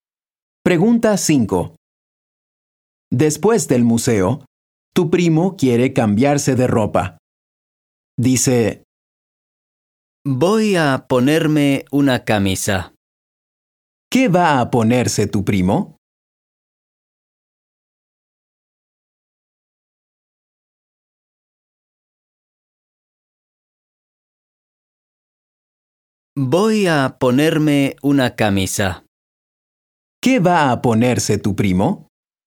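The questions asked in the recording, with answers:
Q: ¿Qué va a ponerse tu primo?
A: Una camisa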